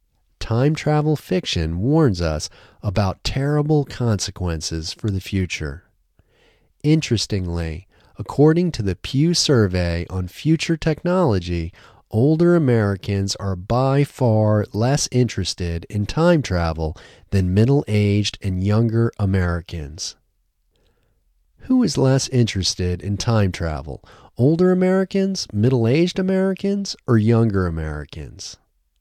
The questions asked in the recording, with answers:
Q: Who is less interested in time travel?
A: Older Americans are less interested in time travel.